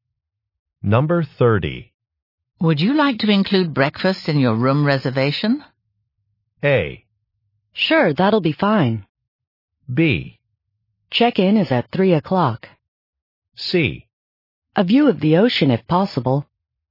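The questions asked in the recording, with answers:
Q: Would you like to include breakfast in your room reservation?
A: A: Sure, that'll be fine.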